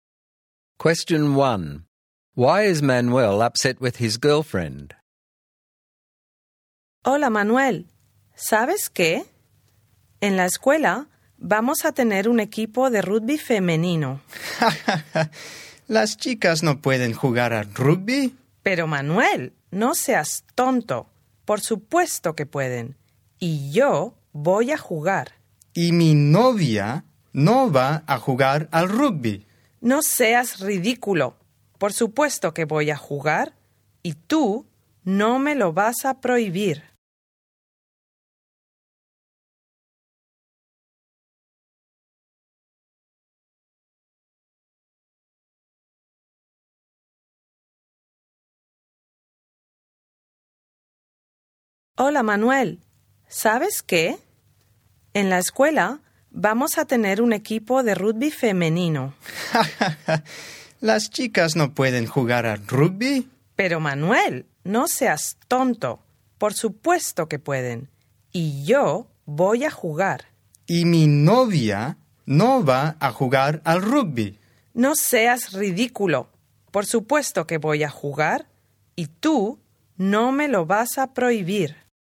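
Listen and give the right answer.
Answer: She is going to play in the school's new girls' rugby team, and he doesn't want his girlfriend playing rugby.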